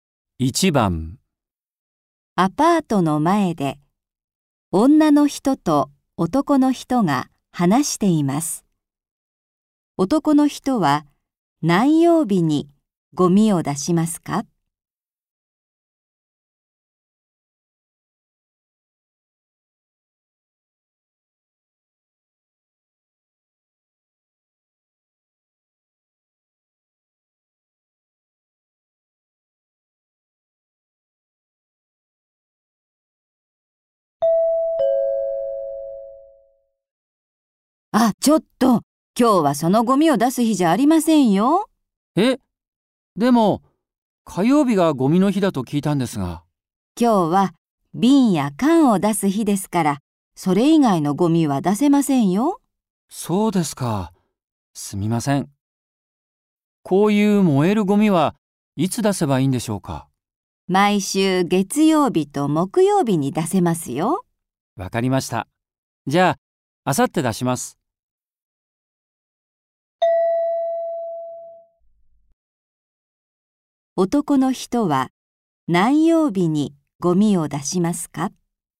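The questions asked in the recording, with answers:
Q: 男の人は何曜日にゴミを出しますか?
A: 木曜日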